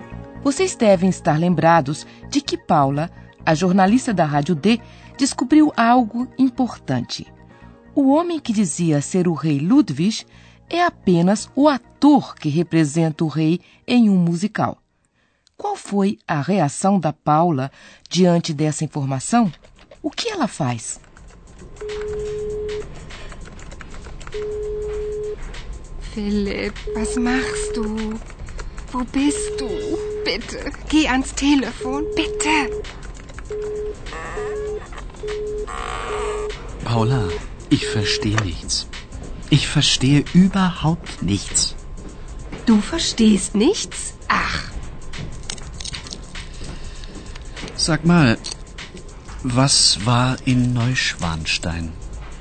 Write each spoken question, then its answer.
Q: Qual foi a reação da Paula diante dessa informação?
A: Paula tenta ligar para Philip, mas infelizmente só ouve o sinal de ocupado.